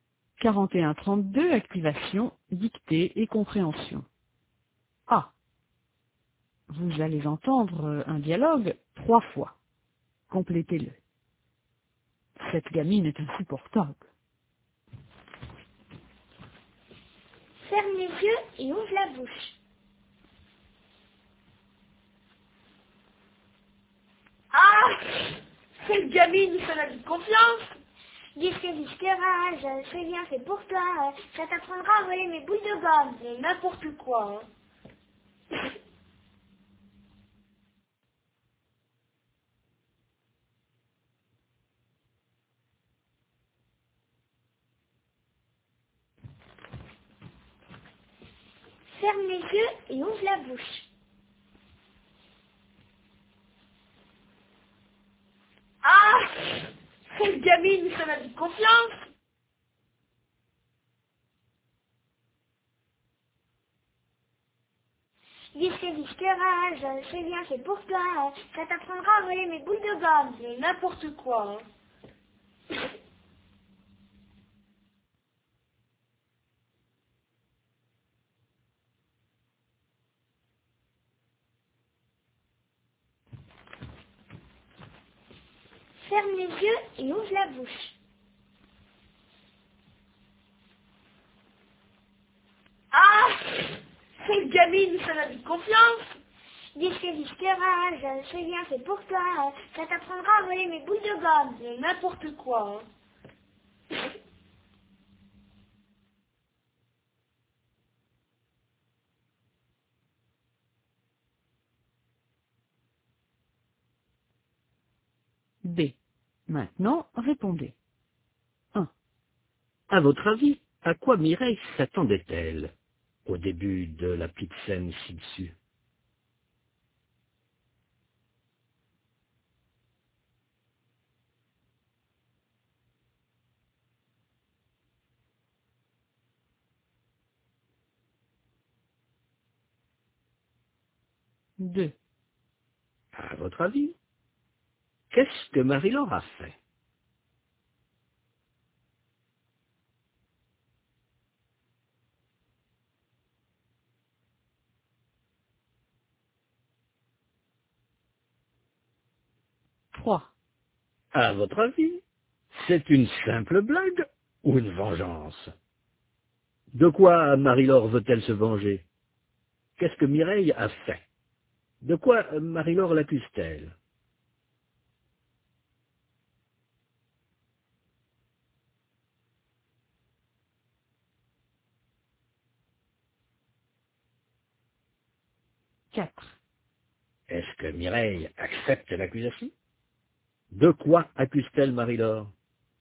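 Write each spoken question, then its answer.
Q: De quoi Marie-Laure l'accuse-t-elle?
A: D'avoir volé ses boules de gomme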